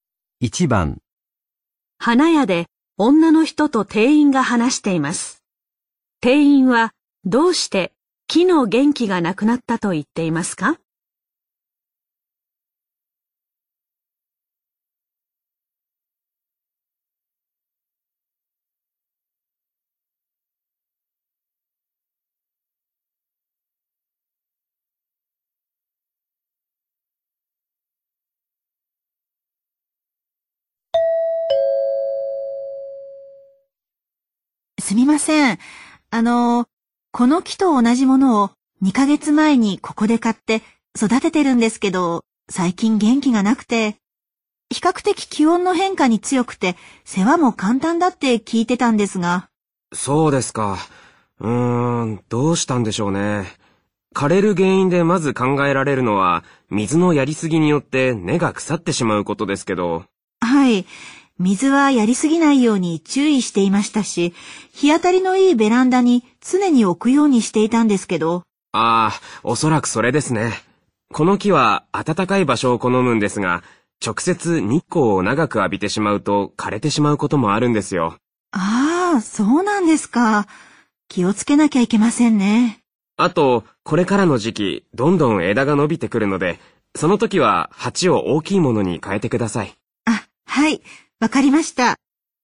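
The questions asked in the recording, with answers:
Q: 店員はどうして木の元気がなくなったと言っていますか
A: 直接日光を長く浴びたから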